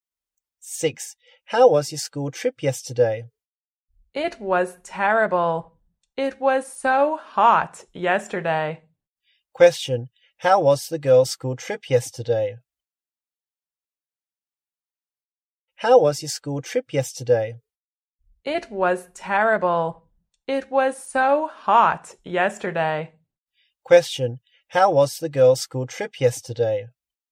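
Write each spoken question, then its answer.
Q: How was the girls' school trip yesterday?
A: Terrible; it was so hot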